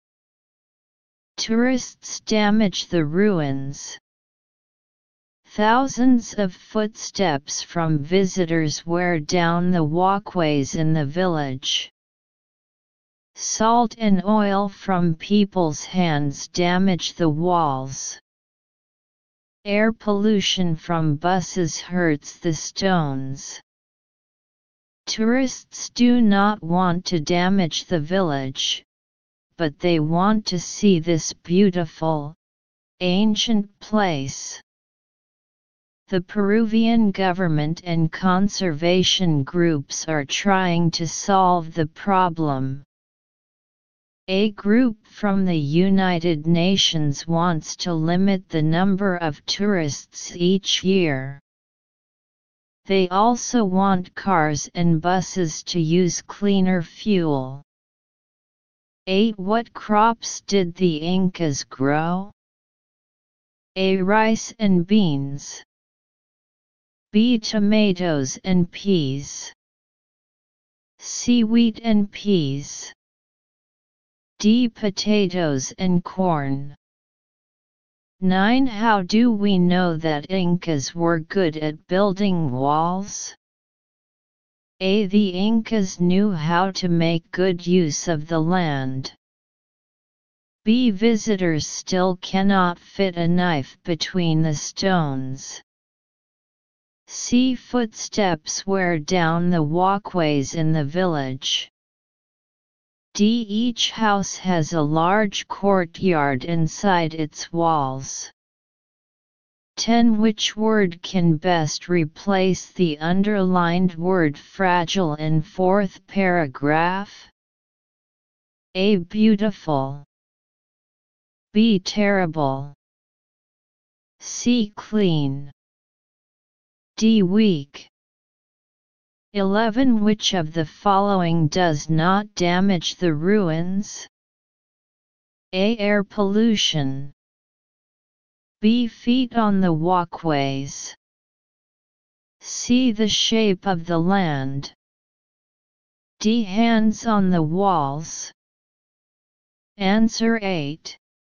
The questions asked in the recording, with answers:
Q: Which of the following does not damage the ruins?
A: 11. C.